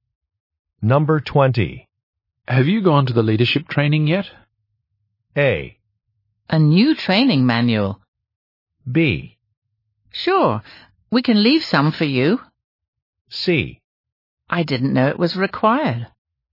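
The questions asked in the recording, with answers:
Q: Have you gone to the leadership training yet?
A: C: I didn't know it was required.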